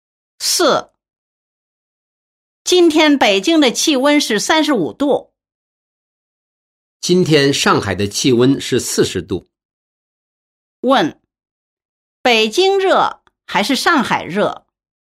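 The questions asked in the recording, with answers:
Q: 问,北京热还是上海热?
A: 上海热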